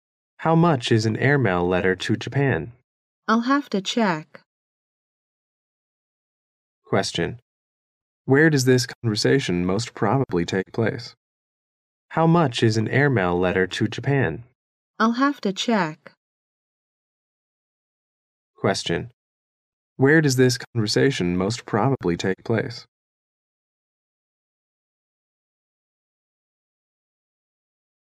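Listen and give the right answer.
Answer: At a post office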